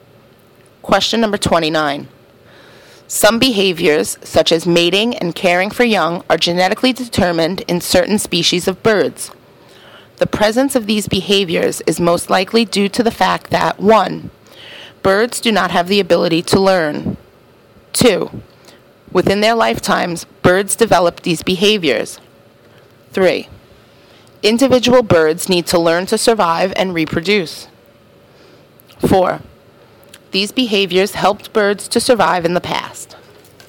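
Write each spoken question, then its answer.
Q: The presence of these behaviors is most likely due to the fact that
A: 4: These behaviors helped birds to survive in the past.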